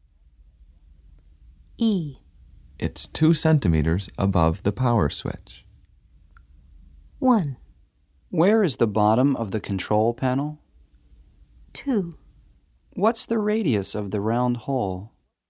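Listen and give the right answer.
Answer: 1: Where is the bottom of the control panel?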